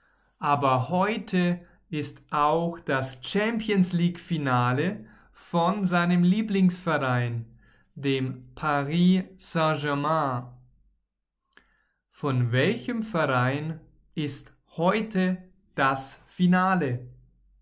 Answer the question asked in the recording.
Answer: Von seinem Lieblingsverein.